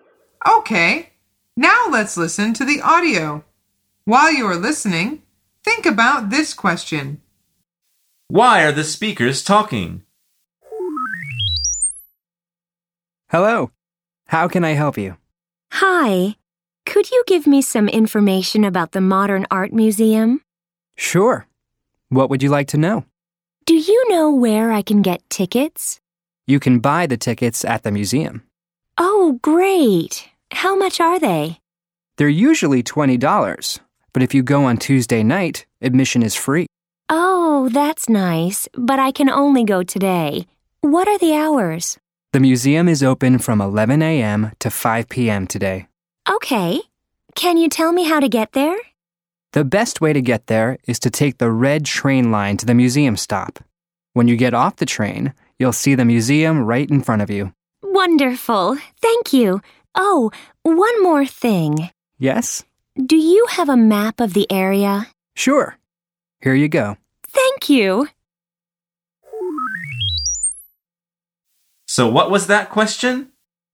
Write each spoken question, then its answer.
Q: Why are the speakers talking?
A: The answer is the woman wants to visit a museum.